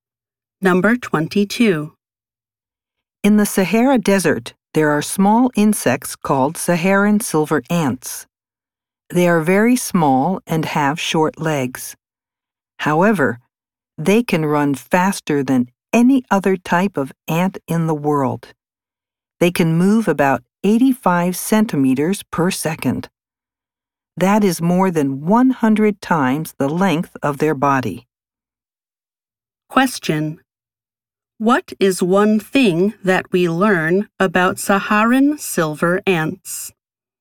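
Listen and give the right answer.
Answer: They can run faster than any other type of ant.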